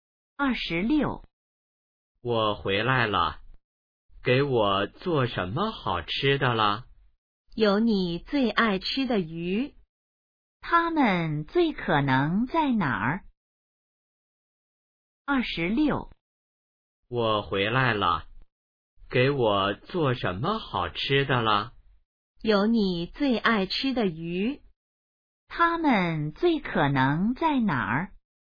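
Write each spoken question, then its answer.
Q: 他们最可能在哪儿?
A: 家里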